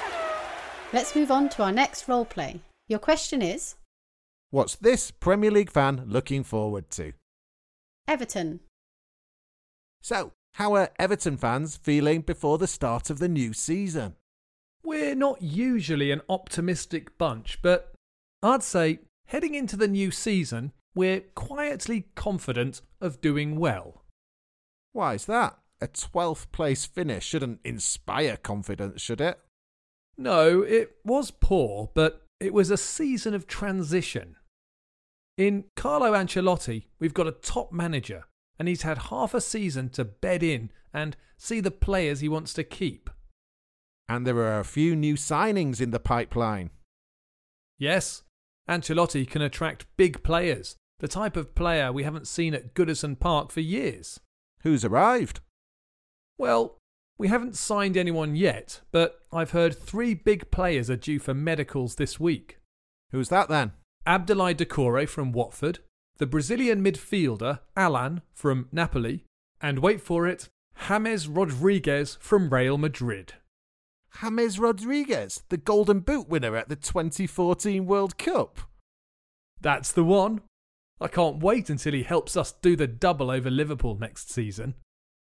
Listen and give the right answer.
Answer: But the thing he's looking forward to most is Everton doing the double over Liverpool.